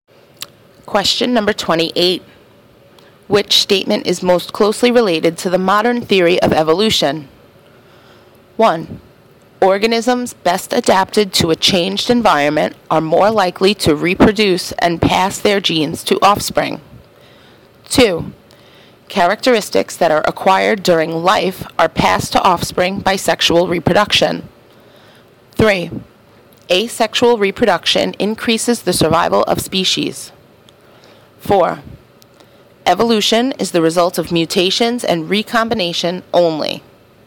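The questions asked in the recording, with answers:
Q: Which statement is most closely related to the modern theory of evolution?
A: 1: Organisms best adapted to a changed environment are more likely to reproduce and pass their genes to offspring.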